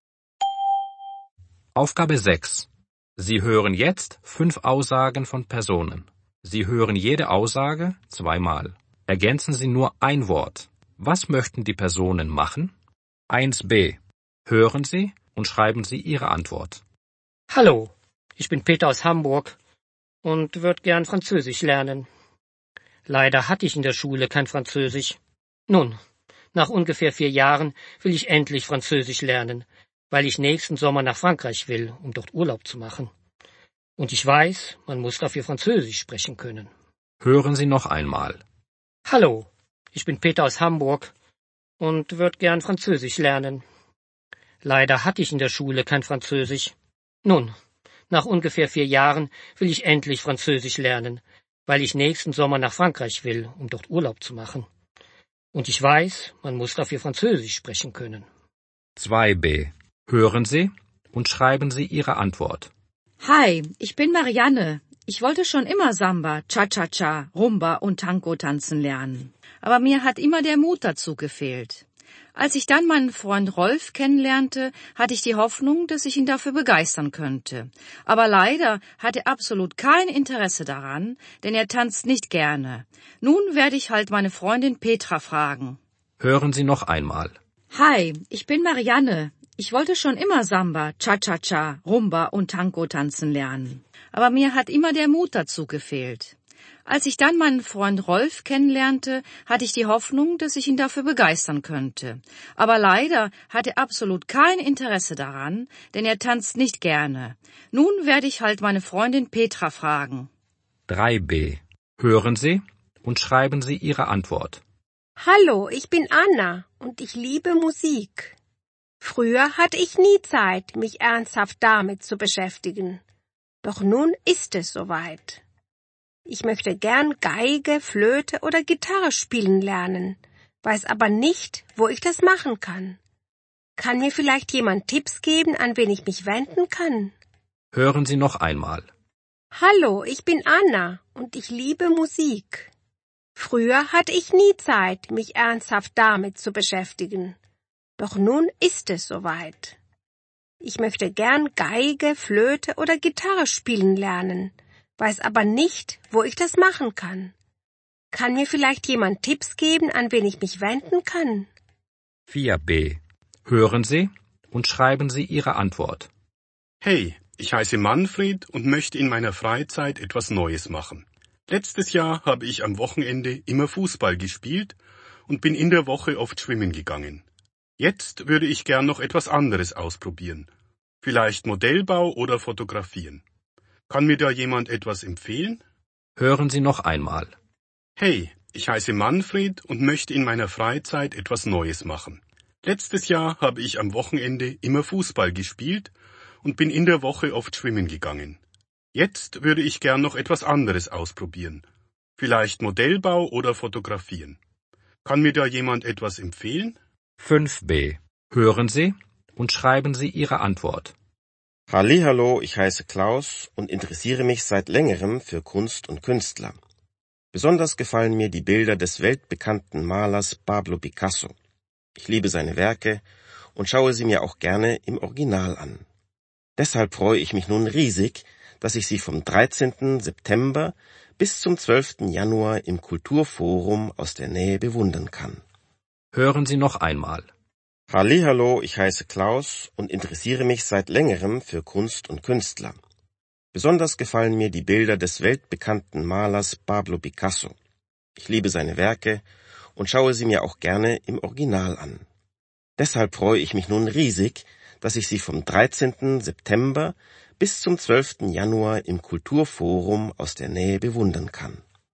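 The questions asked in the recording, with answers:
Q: Was möchten die Personen machen?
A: Französisch lernen

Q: Was möchten die Personen machen?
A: tanzen lernen

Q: Was möchten die Personen machen?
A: ein Instrument spielen lernen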